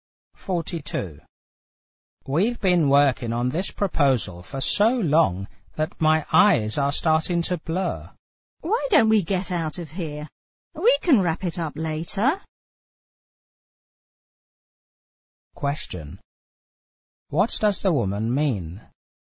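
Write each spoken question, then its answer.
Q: What does the woman mean?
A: They should stop working and finish the proposal later.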